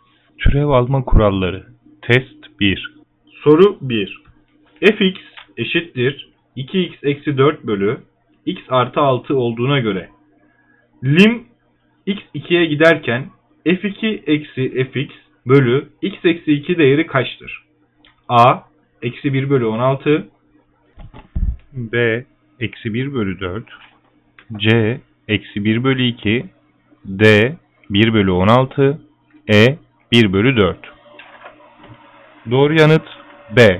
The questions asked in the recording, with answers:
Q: Soru 1 fx eşittir 2x eksi 4 bölü x artı 6 olduğuna göre lim x 2'ye giderken f2 eksi fx bölü x eksi 2 değeri kaçtır?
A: Doğru yanıt B.